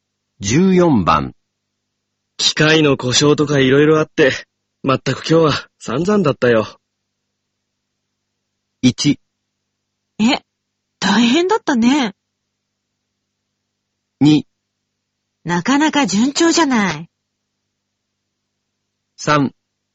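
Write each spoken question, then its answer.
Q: 機械の故障とか色々あって、まったく今日は散々だったよ。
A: 1: え、大変だったね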